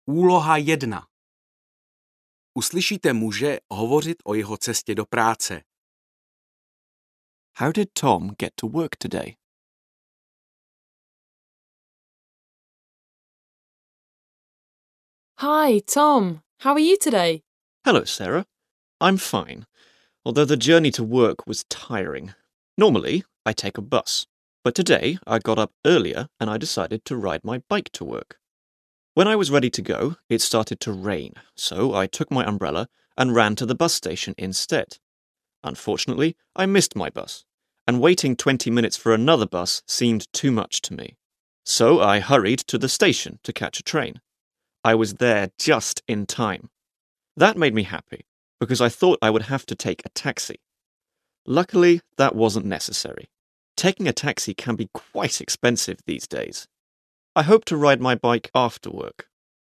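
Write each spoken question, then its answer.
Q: How did Tom get to work today?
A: By train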